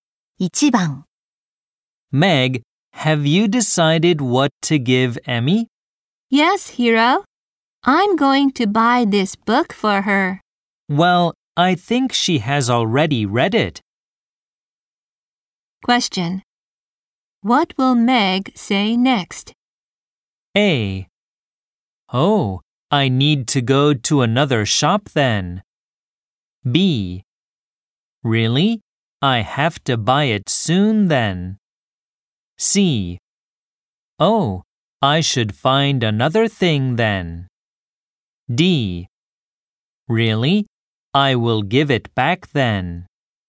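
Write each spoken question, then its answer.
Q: What will Meg say next?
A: C: Oh, I should find another thing then.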